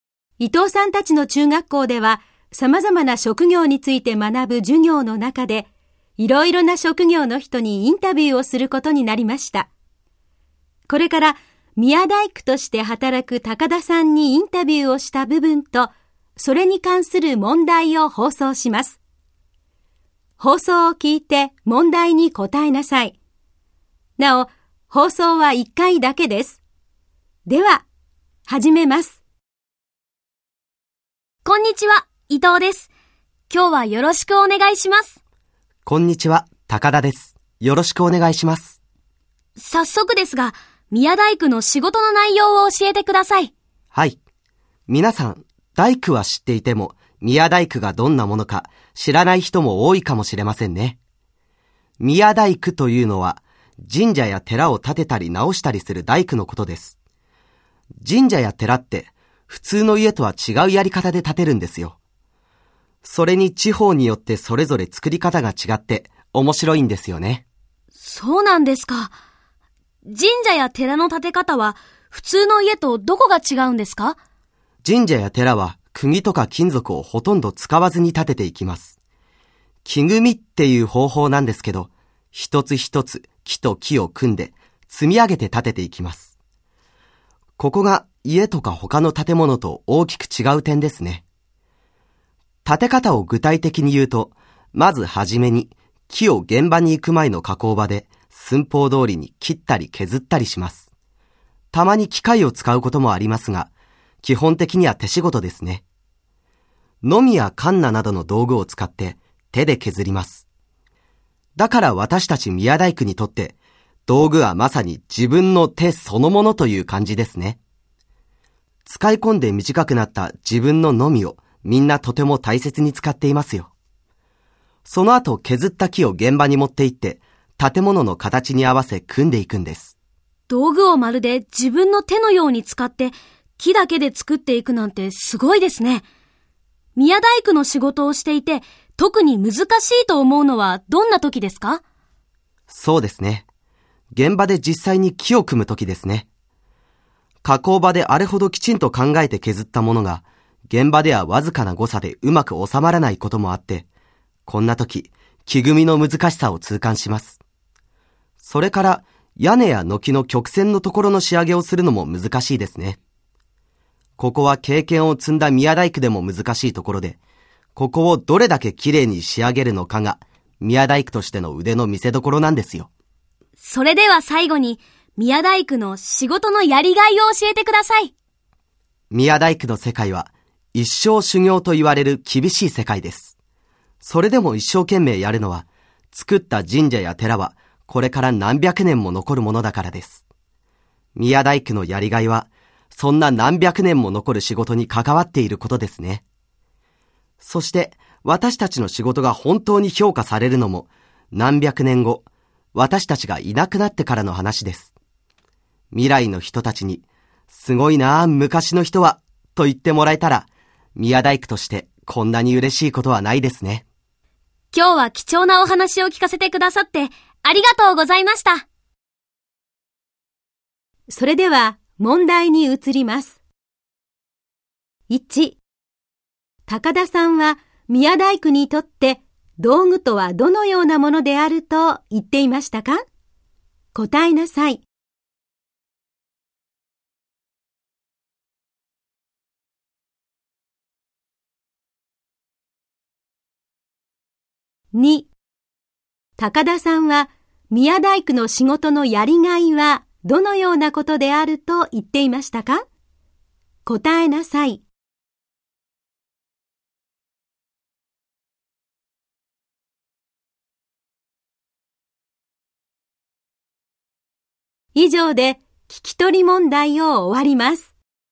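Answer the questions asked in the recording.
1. 自分の手そのもの
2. 何百年も残る仕事に関わっていること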